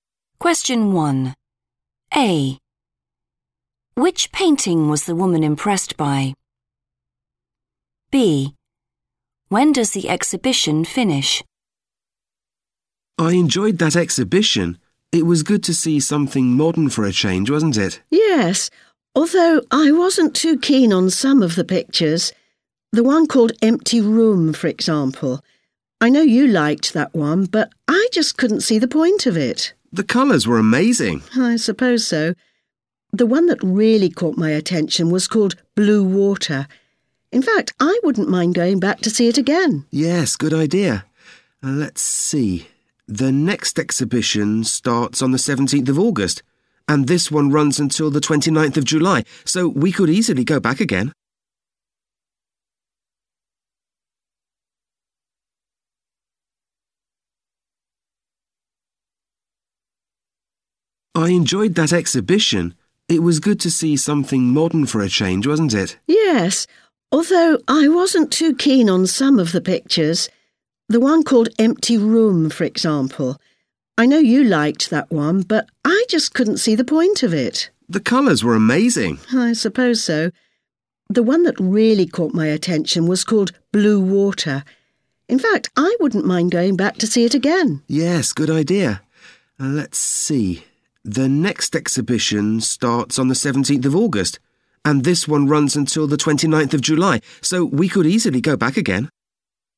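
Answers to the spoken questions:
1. Blue Water
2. 29th of July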